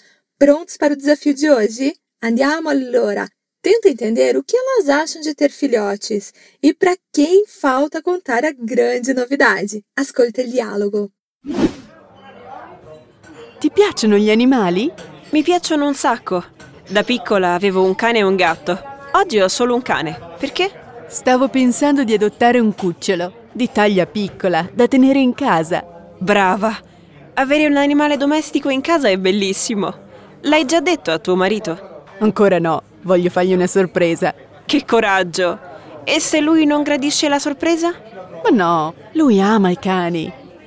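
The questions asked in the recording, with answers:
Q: Tenta entender o que elas acham de ter filhotes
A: Acham ótimo: ter um animal de estimação em casa é lindo (bellissimo)

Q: para quem falta contar a grande novidade.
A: Para o marido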